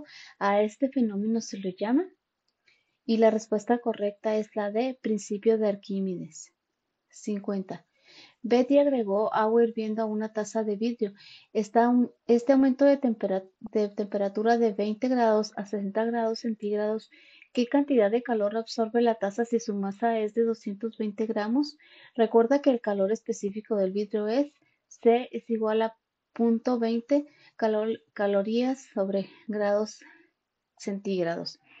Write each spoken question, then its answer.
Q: ¿qué cantidad de calor absorbe la taza si su masa es de 220 gramos?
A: 1760 calorías